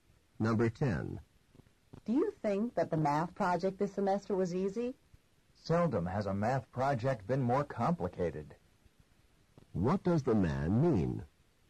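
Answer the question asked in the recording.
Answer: The project was very complicated.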